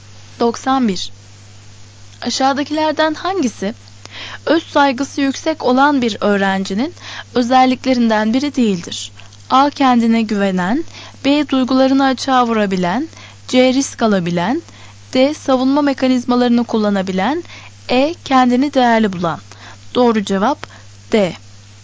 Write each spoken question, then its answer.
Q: Aşağıdakilerden hangisi öz saygısı yüksek olan bir öğrencinin özelliklerinden biri değildir?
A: Doğru cevap D.